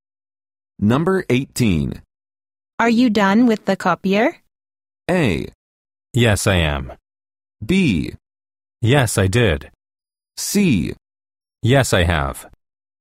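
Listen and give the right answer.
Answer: A: Yes, I am.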